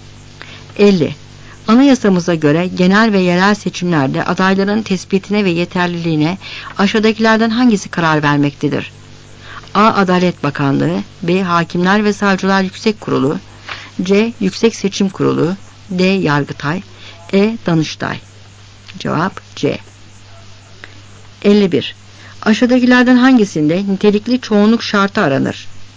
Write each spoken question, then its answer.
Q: Anayasamıza göre genel ve yerel seçimlerde adayların tespitine ve yeterliliğine aşağıdakilerden hangisi karar vermektedir?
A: Cevap C.